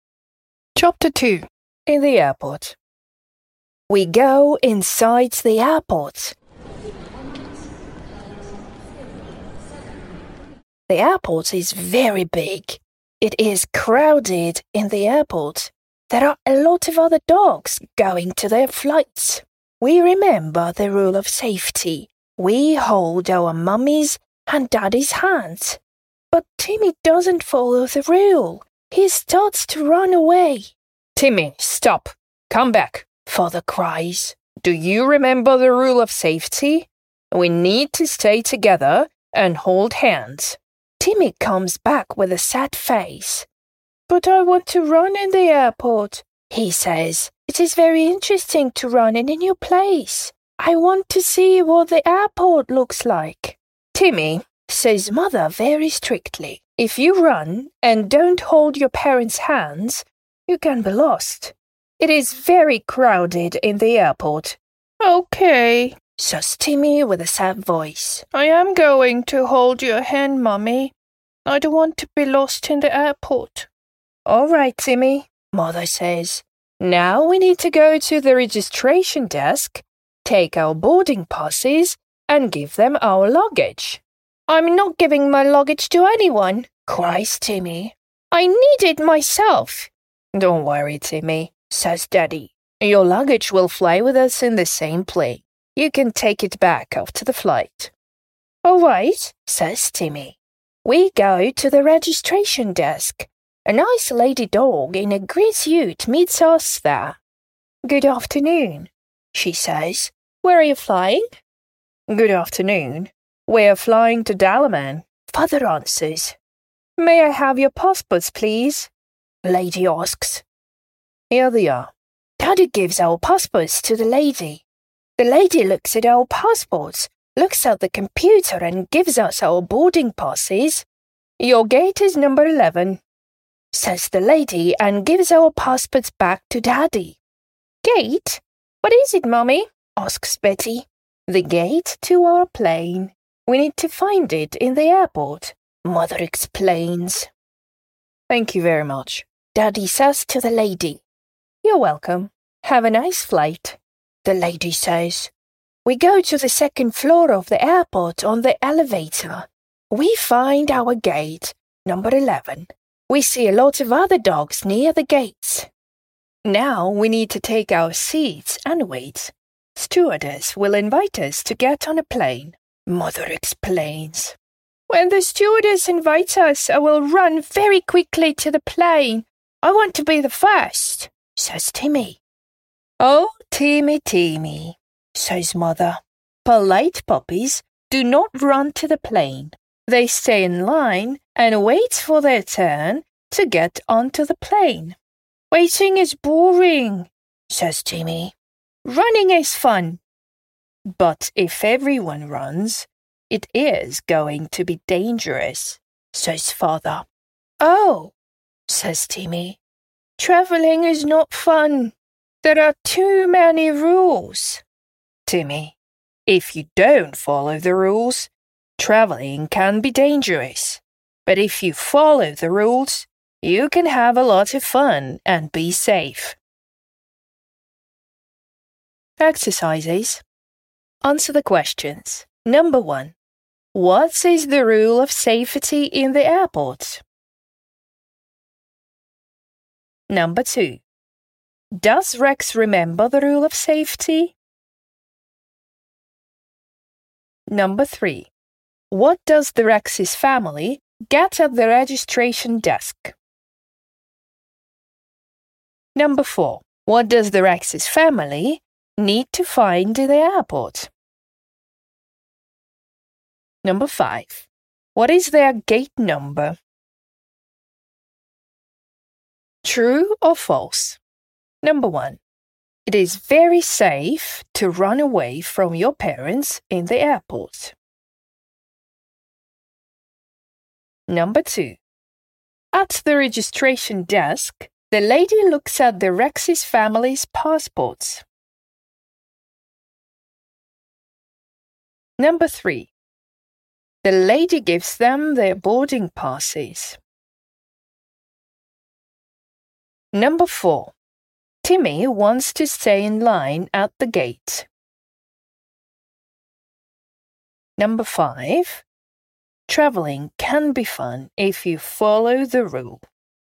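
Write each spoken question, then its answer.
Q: What is the rule of safety in the airport?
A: Stay together and hold your parents' hands

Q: Does Rex remember the rule of safety?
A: Yes

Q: What does the Rex's family get at the registration desk?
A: Boarding passes

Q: What does the Rex's family need to find in the airport?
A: Their gate

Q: What is their gate number?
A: 11

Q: It is very safe to run away from your parents in the airport.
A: False

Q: At the registration desk, the lady looks at the Rex's family's passports.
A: True

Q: The lady gives them their boarding passes.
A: True

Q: Timmy wants to stay in line at the gate.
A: False

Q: Travelling can be fun if you follow the rule.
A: True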